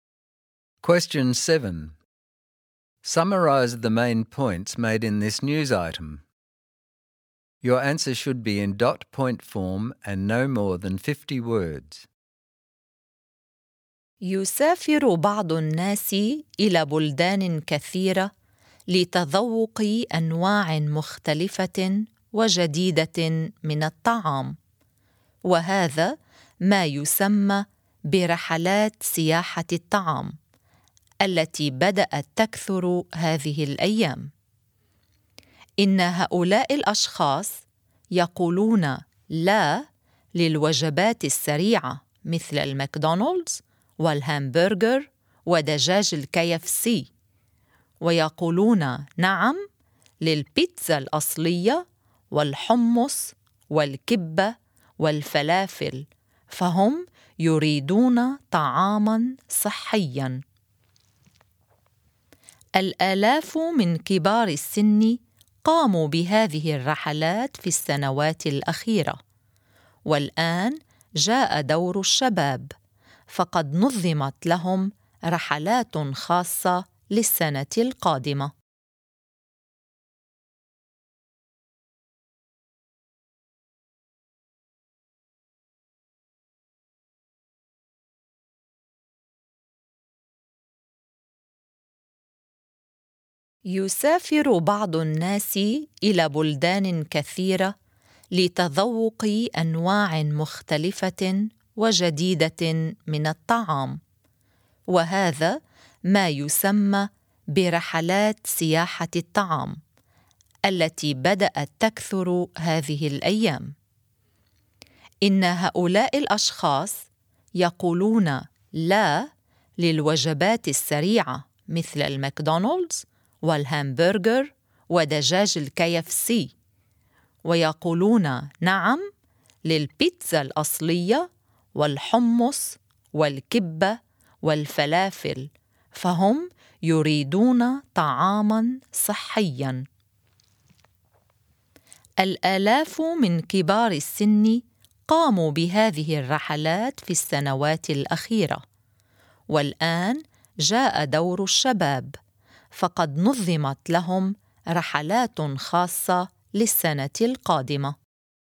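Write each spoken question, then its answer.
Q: Summarize the main points made in this news item.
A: Food tourism is increasing; people travel to taste new foods; they reject fast food and want healthy, authentic food; thousands of older people have gone, and special trips are now organised for young people next year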